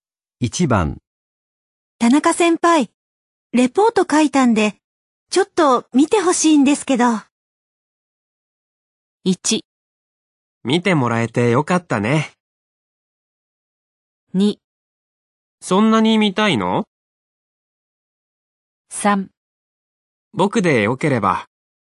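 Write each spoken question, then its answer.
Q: 田中先輩、レポート書いたんで、ちょっと見てほしいんですけど。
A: 3: 僕でよければ。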